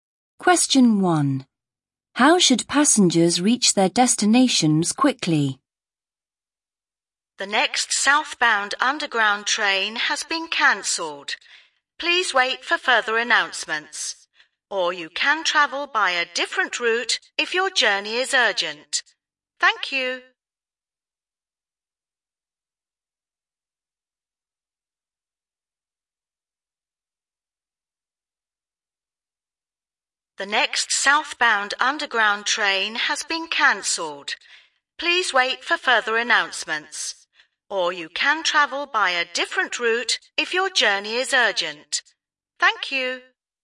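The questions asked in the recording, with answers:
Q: How should passengers reach their destinations quickly?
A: Travel by a different route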